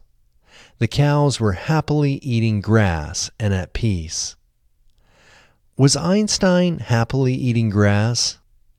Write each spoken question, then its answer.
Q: Was Einstein happily eating grass?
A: No, Einstein wasn't happily eating grass.